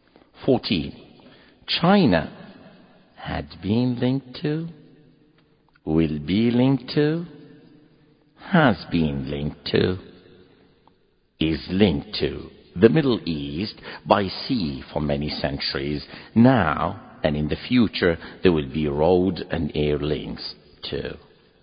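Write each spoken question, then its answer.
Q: China had been linked to, will be linked to, has been linked to, is linked to the Middle East by sea for many centuries.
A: C: has been linked to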